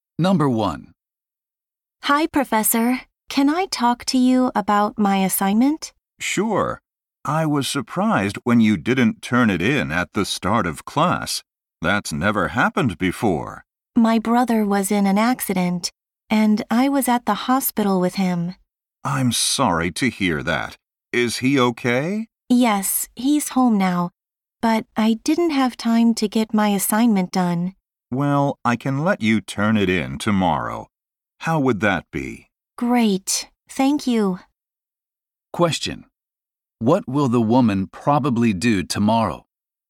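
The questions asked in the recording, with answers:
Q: What will the woman probably do tomorrow?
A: Turn in her assignment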